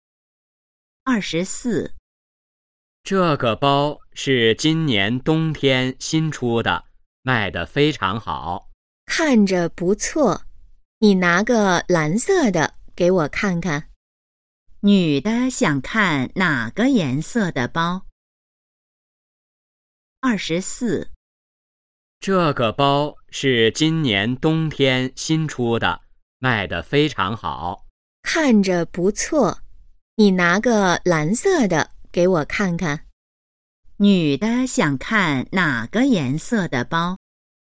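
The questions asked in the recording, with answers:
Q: 女的想看哪个颜色的包?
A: 蓝色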